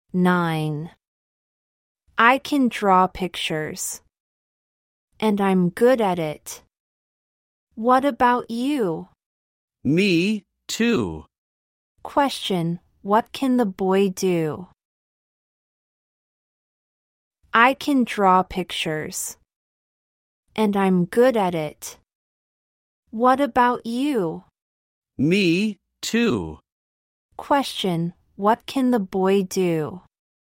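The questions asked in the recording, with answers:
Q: Question, what can the boy do?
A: He can draw pictures.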